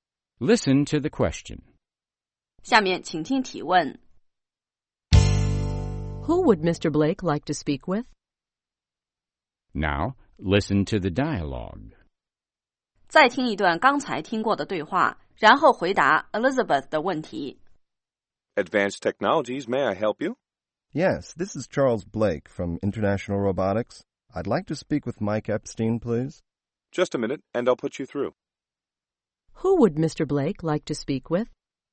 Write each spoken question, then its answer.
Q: Who would Mr. Blake like to speak with?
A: He'd like to speak with Mr. Epstein.